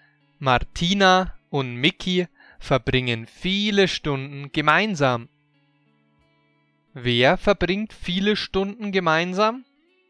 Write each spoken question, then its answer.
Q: Wer verbringt viele Stunden gemeinsam?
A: Martina und Mickey. Sie verbringen viele Stunden gemeinsam.